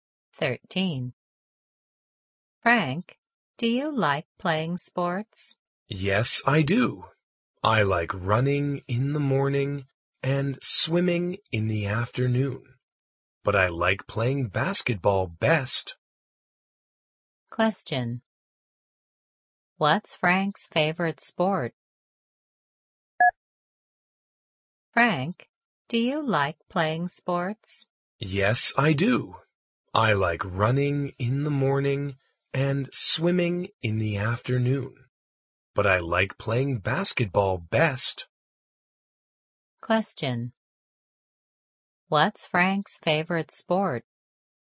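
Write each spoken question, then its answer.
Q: What's Frank's favorite sport?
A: Basketball.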